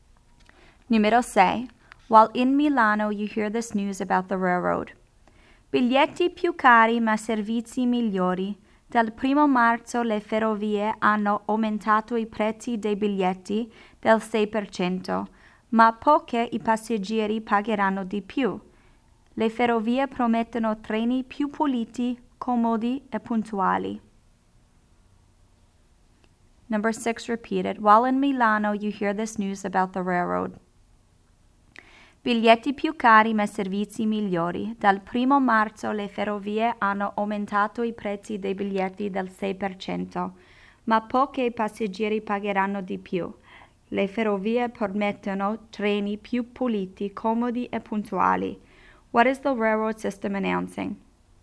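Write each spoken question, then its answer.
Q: What is the railroad system announcing?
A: Ticket prices are going up 6%, but service will be better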